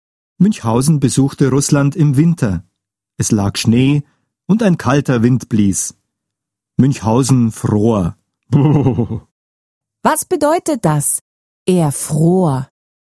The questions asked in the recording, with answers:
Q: Was bedeutet das? Er fror.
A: Münchhausen fror. Ihm war kalt.